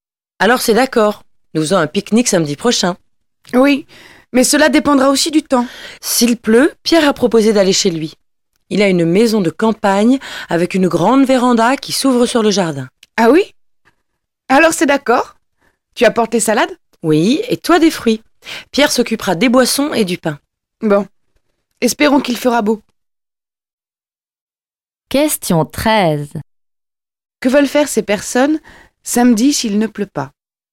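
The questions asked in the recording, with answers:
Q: Que veulent faire ces personnes samedi s'il ne pleut pas ?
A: Faire un pique-nique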